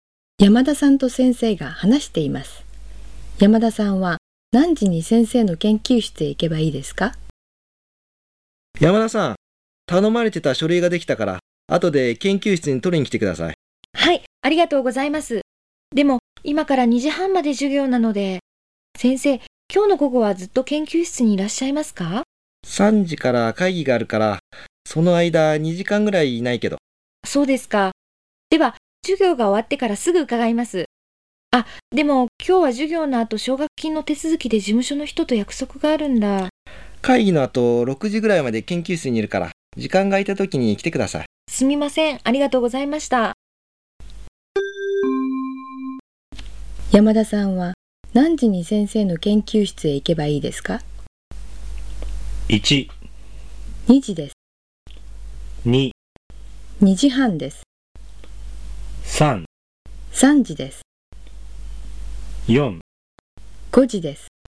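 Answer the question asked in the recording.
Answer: 4: 5時です。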